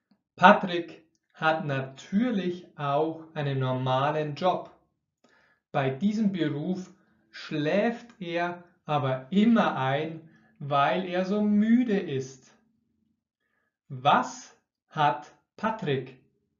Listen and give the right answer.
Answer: Er hat natürlich auch einen normalen Job, das heißt einen Beruf während des Tages, eine